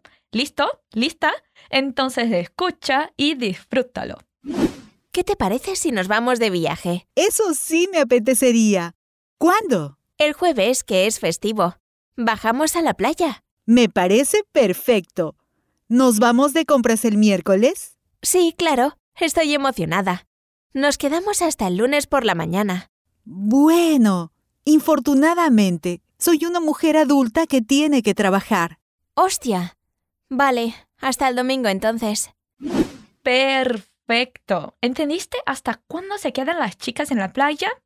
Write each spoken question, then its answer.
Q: ¿Entendiste hasta cuándo se quedan las chicas en la playa?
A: se pueden quedar en la playa hasta el domingo porque su amiga tiene que trabajar el lunes